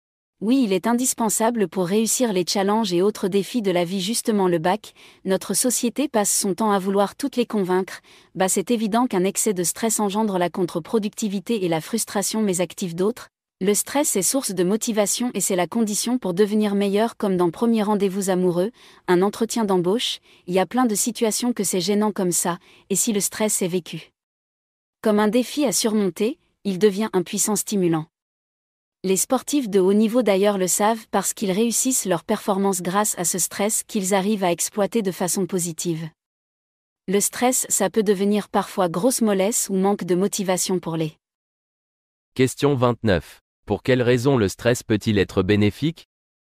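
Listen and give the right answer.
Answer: Il est source de motivation et un puissant stimulant qui aide à devenir meilleur et à réussir ses performances.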